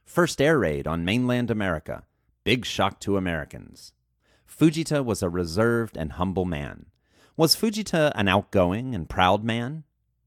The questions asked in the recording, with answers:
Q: Was Fujita an outgoing and proud man?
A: No, Fujita was not an outgoing and proud man.